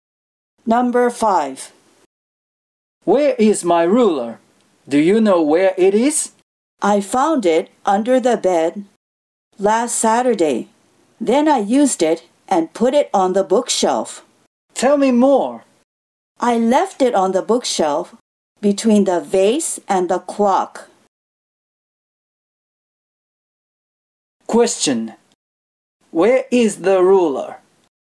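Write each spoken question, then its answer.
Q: Question. Where is the ruler?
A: On the bookshelf, between the vase and the clock.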